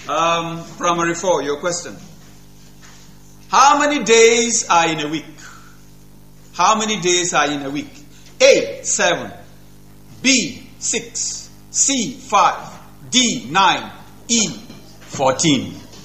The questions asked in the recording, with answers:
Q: How many days are in a week?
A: A, 7.